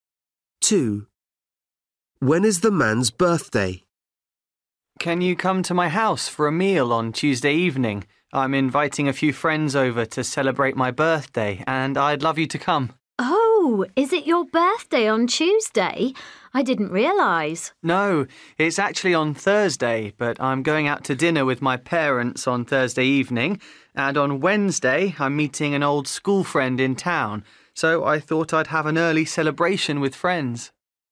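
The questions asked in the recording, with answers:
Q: When is the man's birthday?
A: Thursday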